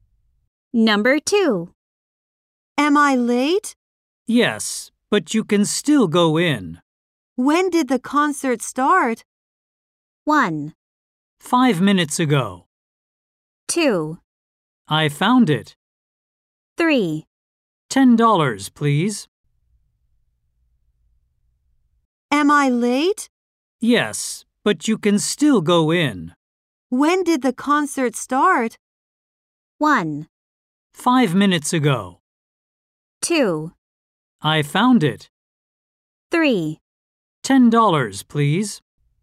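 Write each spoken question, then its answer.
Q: When did the concert start?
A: 1: 5 minutes ago.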